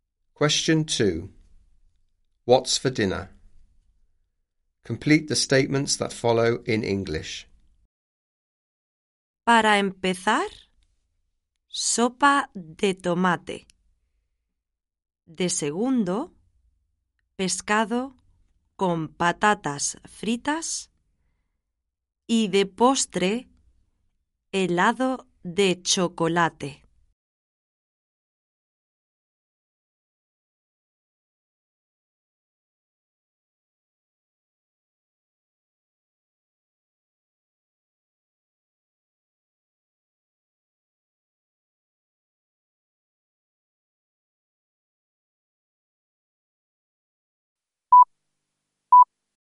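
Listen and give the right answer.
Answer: Tomato soup, then fish and chips, then chocolate ice cream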